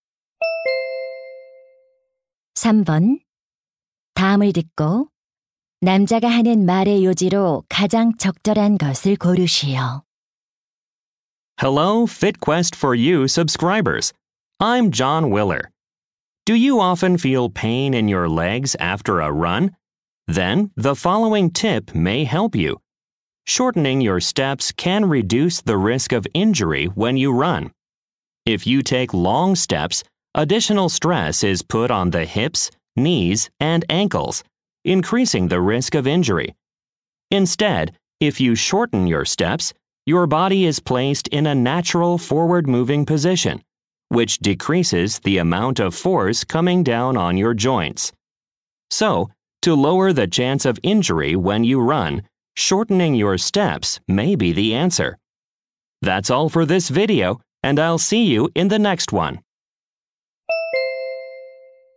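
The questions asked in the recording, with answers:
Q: 다음을 듣고 남자가 하는 말의 요지로 가장 적절한 것을 고르시오.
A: 달릴 때 보폭을 줄이면 부상 위험을 줄일 수 있다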